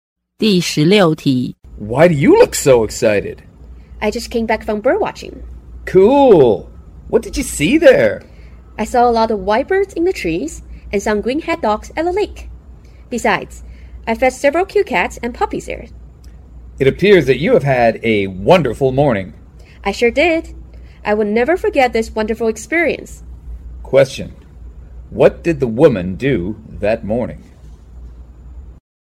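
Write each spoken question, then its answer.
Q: What did the woman do that morning?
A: She went bird watching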